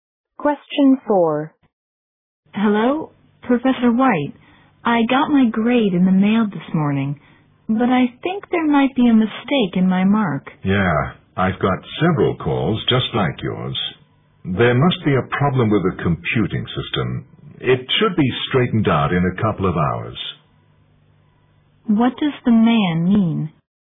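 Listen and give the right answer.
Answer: The grade error comes from a computer problem and will be corrected soon.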